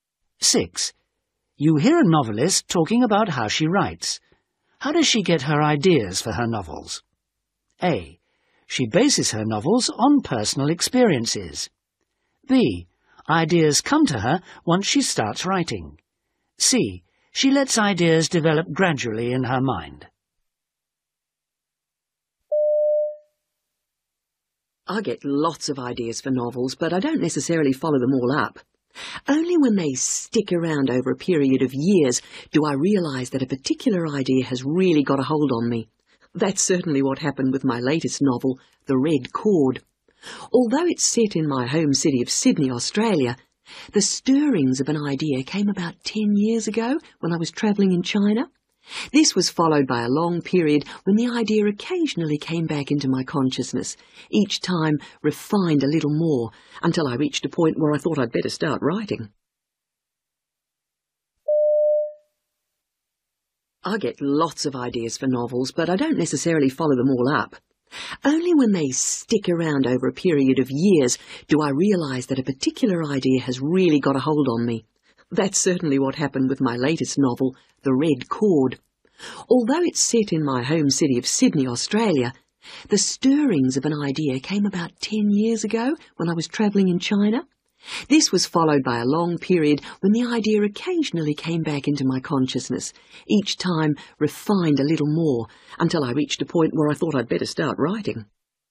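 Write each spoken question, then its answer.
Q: How does she get her ideas for her novels?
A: C: She lets ideas develop gradually in her mind.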